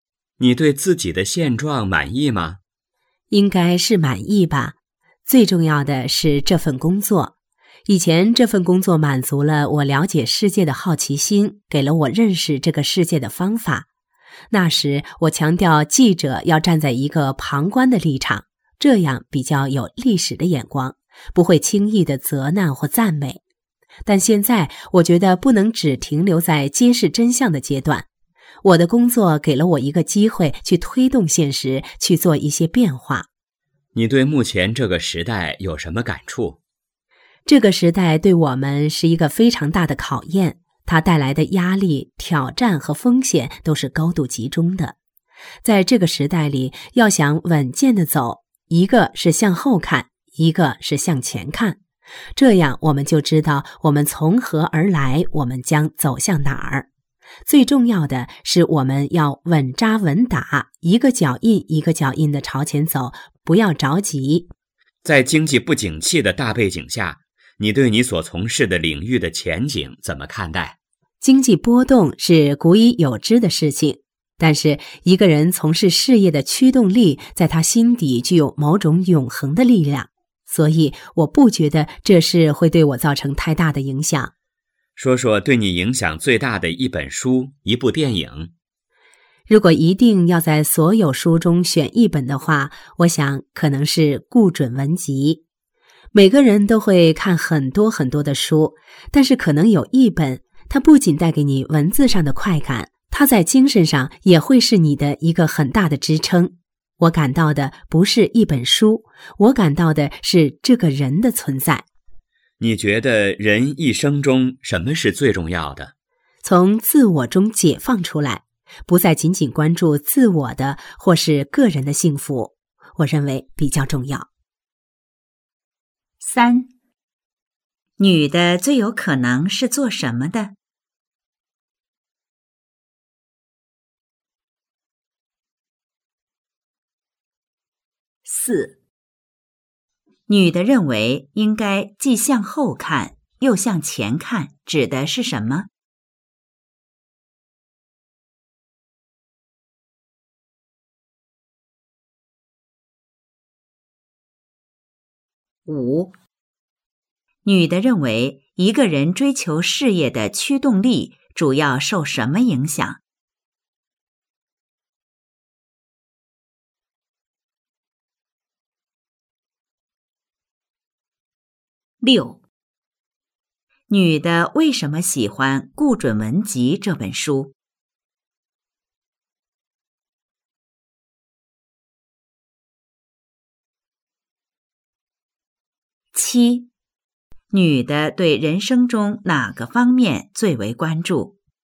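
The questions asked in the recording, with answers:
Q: 女的最有可能是做什么的?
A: 记者

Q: 女的认为应该既向后看又向前看,指的是什么?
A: 知道我们从何而来,将走向哪儿

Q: 女的为什么喜欢《顾准文集》这本书?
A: 它在精神上给她很大的支撑

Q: 女的对人生中哪个方面最为关注?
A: 从自我中解放出来,不只关注个人幸福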